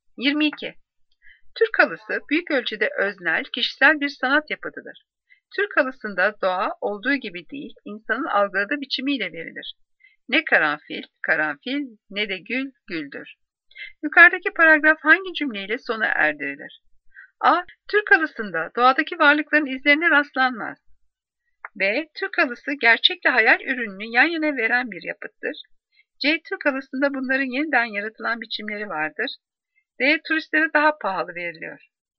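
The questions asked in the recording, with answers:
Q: Yukarıdaki paragraf hangi cümleyle sona erdirilir?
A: C: Türk halısında bunların yeniden yaratılan biçimleri vardır.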